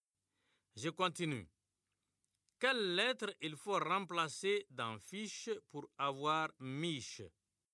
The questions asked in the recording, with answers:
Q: Quelle lettre il faut remplacer dans fiche pour avoir miche?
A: Monsieur, c'est la lettre F.